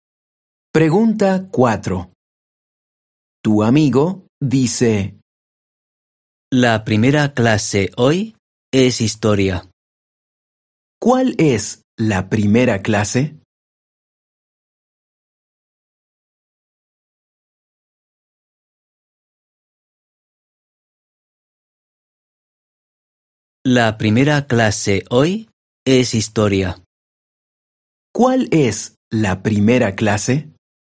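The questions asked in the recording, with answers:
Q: ¿Cuál es la primera clase?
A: Historia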